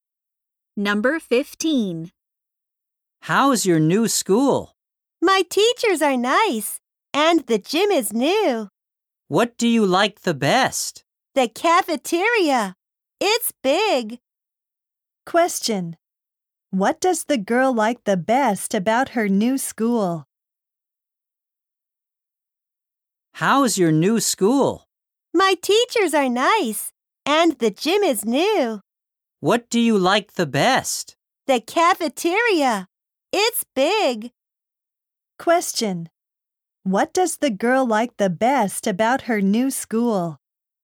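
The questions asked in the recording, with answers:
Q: What does the girl like the best about her new school?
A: The cafeteria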